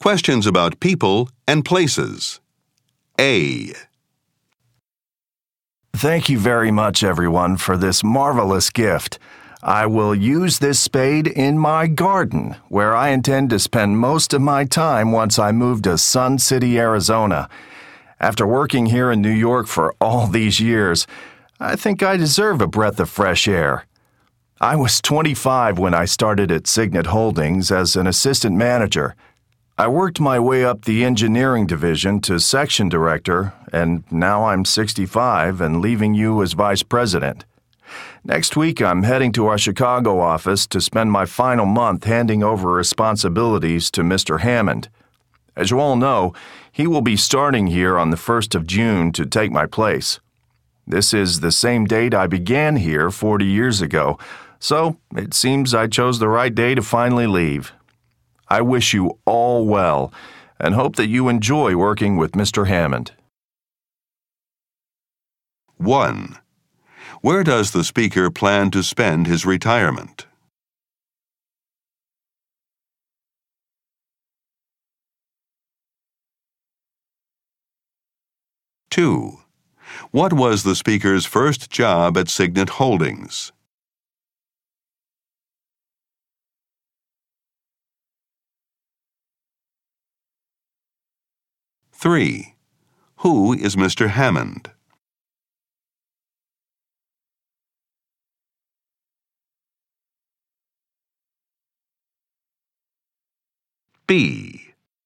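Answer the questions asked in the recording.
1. Sun City, Arizona
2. Assistant manager
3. The speaker's replacement as vice president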